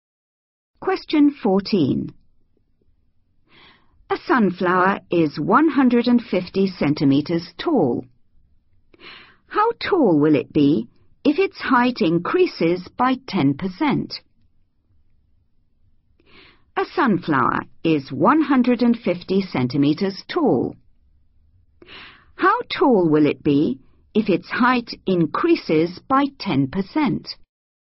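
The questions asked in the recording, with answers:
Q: How tall will it be if its height increases by 10%?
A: 165 cm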